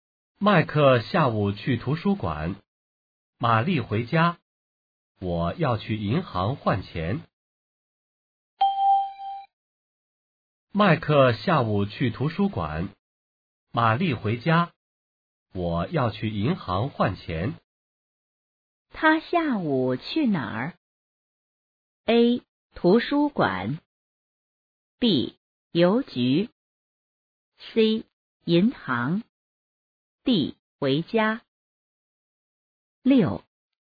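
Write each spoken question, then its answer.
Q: 他下午去哪儿?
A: C: 银行。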